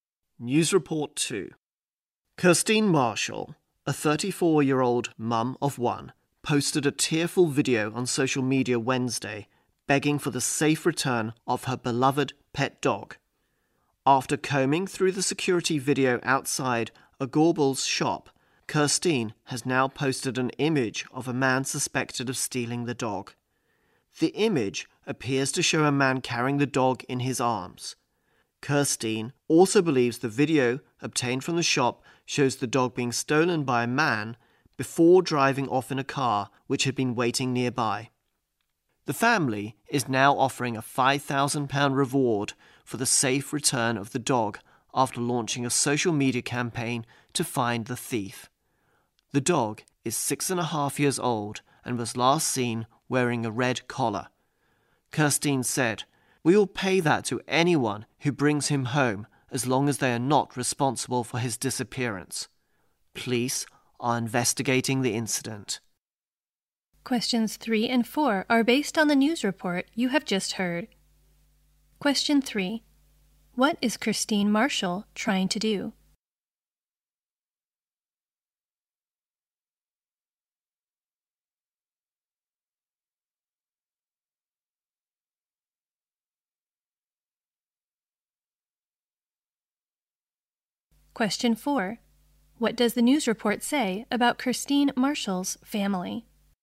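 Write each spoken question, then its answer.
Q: What is Kirstine Marshall trying to do?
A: Get her stolen pet dog back

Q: What does the news report say about Kirstine Marshall's family?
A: They are offering a £5,000 reward for the dog's safe return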